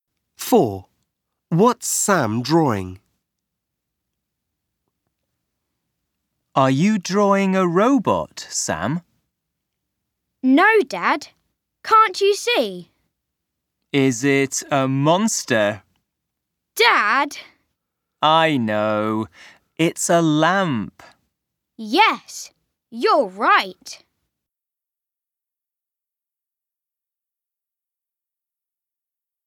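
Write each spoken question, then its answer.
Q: What's Sam drawing?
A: a lamp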